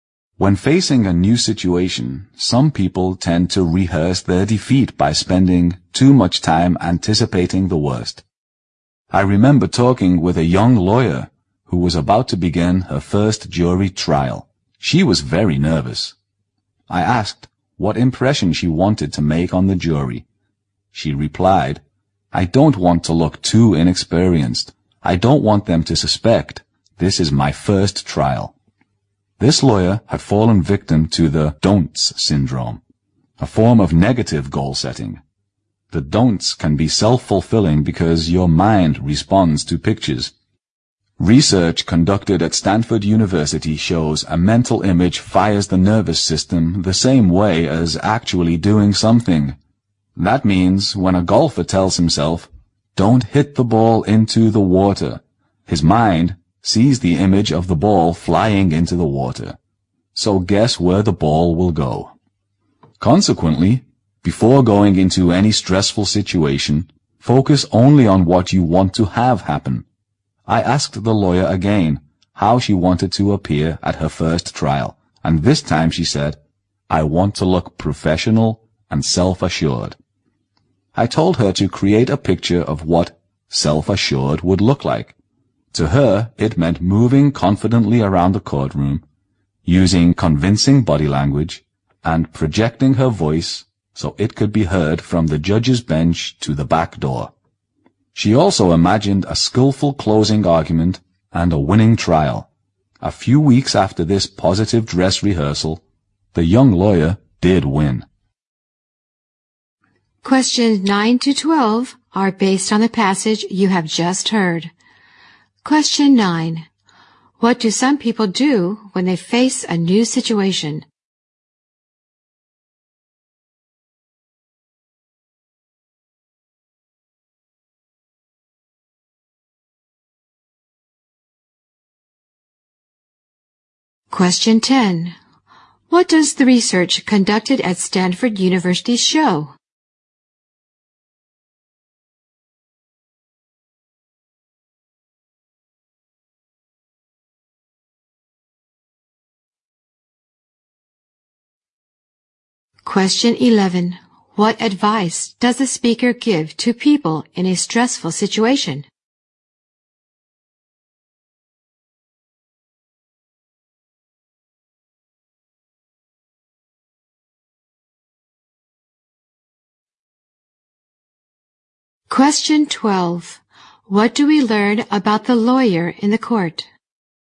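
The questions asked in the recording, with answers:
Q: What do some people do when they face a new situation?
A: They spend too much time anticipating the worst.

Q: What does the research conducted at Stanford University show?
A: A mental image fires the nervous system the same way as actually doing something.

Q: What advice does a speaker give to people in a stressful situation?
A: Focus only on what you want to have happen.

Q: What do we learn about the lawyer in the court?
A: She won her first trial.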